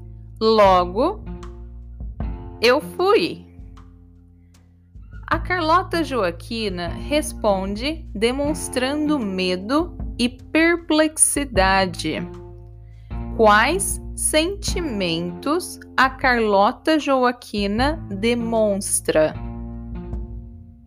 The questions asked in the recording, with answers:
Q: Quais sentimentos a Carlota Joaquina demonstra?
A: medo e perplexidade. A Carlota Joaquina demonstra medo e perplexidade.